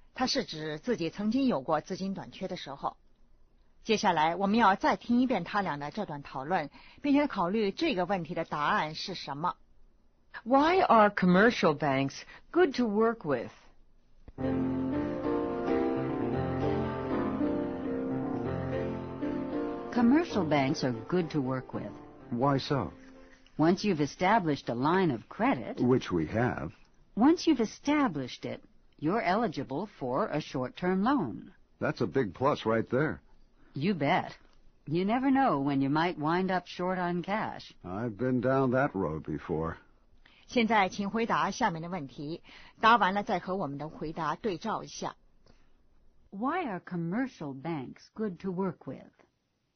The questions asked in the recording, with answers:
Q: Why are commercial banks good to work with?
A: Short-term loan availability.